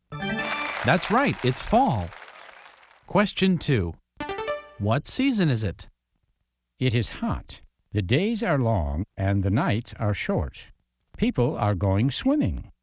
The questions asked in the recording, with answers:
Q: What season is it?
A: It's summer.